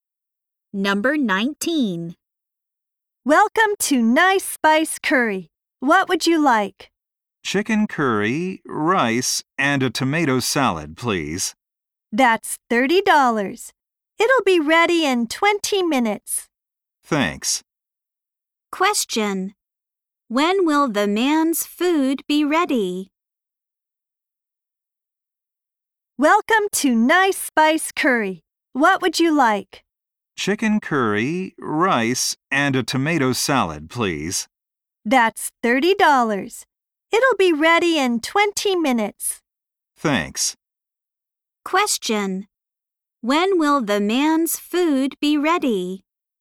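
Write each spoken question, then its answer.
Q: When will the man's food be ready?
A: In 20 minutes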